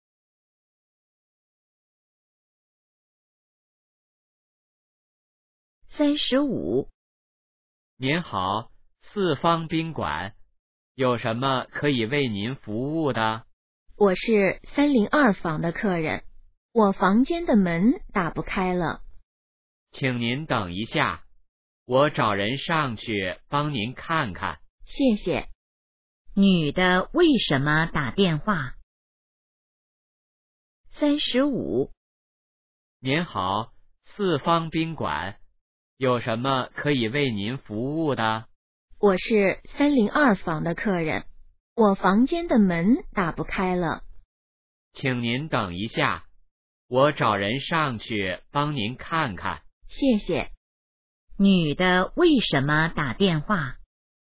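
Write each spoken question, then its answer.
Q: 女的为什么打电话?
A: 房间的门打不开了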